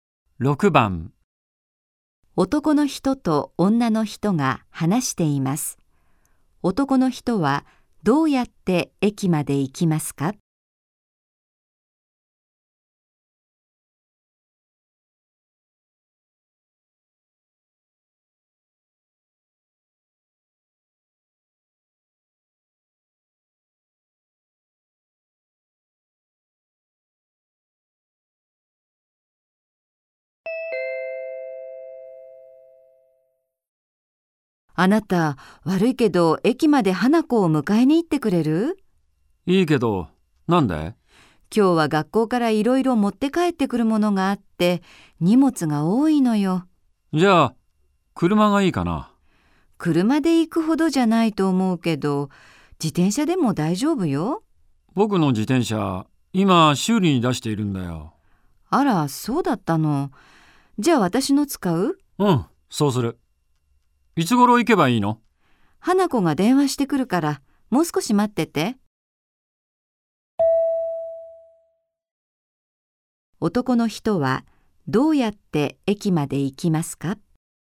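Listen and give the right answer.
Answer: 女の人の自転車で行く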